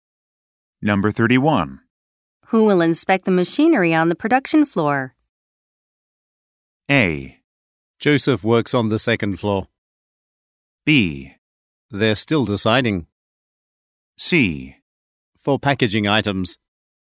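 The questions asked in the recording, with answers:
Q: Who will inspect the machinery on the production floor?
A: B: They're still deciding.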